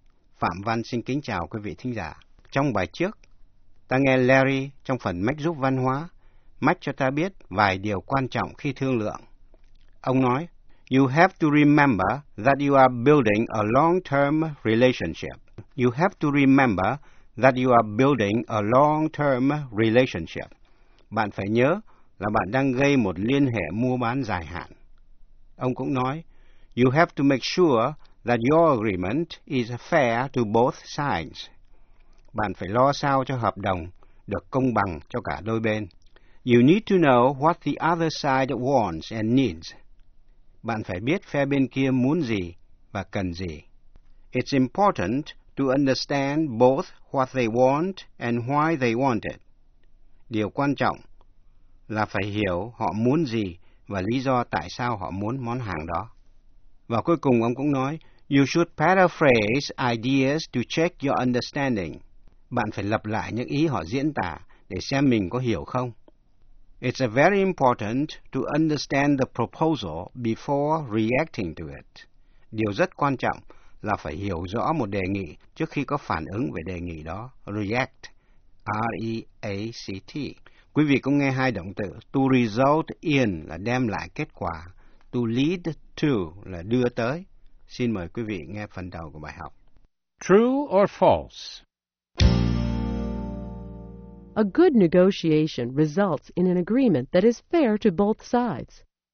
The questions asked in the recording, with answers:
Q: A good negotiation results in an agreement that is fair to both sides.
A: True. Negotiation can lead to a win-win situation.